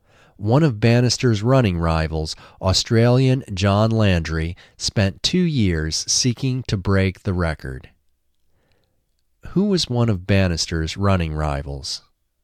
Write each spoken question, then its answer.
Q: Who was one of Bannister's running rivals?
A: Australian John Landry was one of Bannister's running rivals.